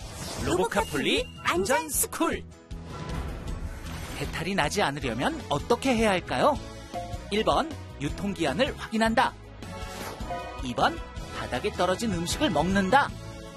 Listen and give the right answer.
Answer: 정답은 1번. 음식을 먹기 전에는 유통기한을 꼭 확인해야 해요.